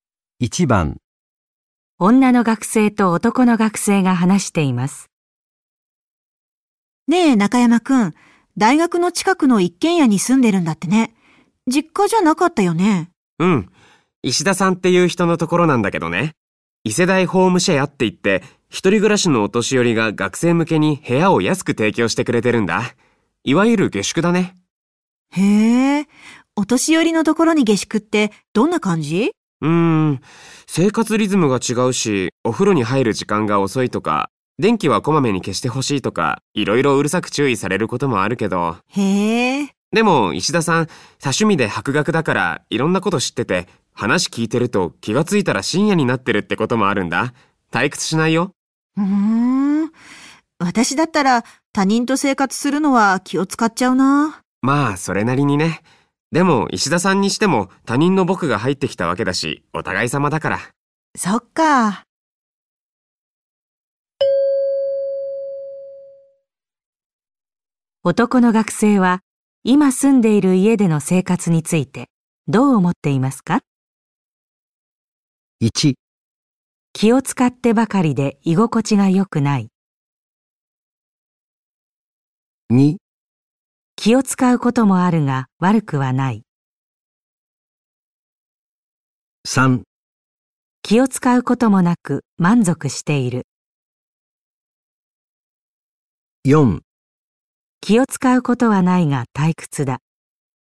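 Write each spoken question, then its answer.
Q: 男の学生は今住んでいる家での生活についてどう思っていますか?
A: 2: 気を使うこともあるが悪くはない。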